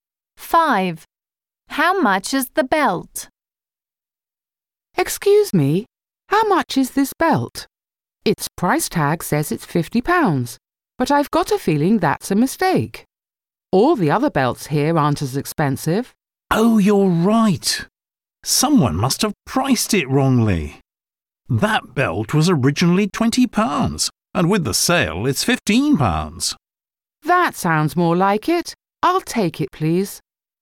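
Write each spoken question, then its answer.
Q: How much is the belt?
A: £15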